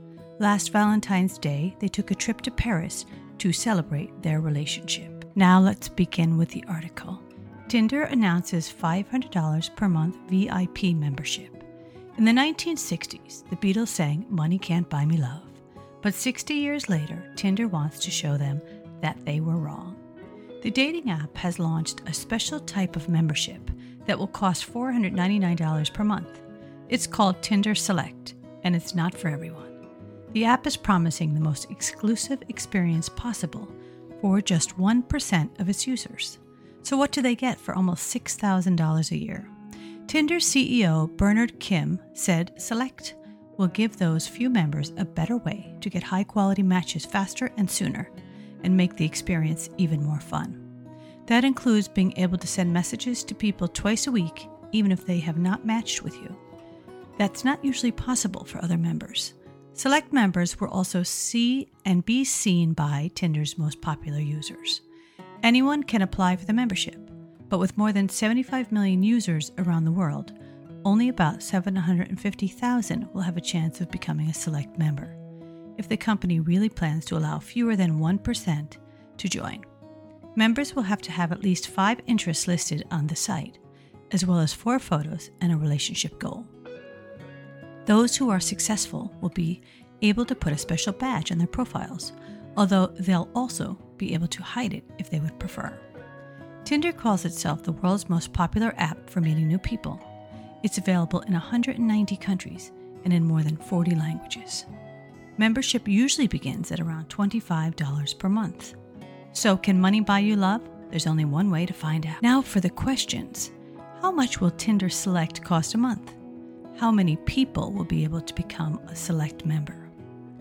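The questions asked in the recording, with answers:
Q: How much will Tinder Select cost a month?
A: $499 per month

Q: How many people will be able to become a Select member?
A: About 750,000 (fewer than 1% of users)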